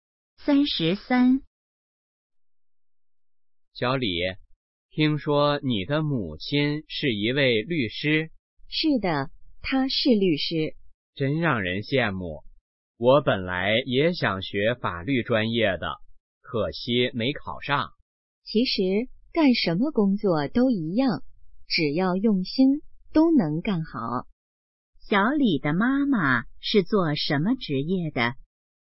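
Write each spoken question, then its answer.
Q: 小李的妈妈是做什么职业的?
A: 律师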